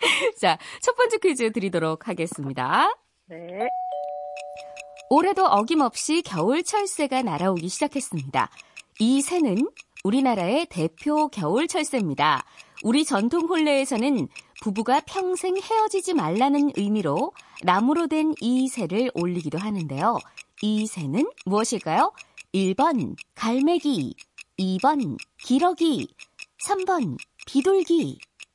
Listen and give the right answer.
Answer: 기러기 정답입니다.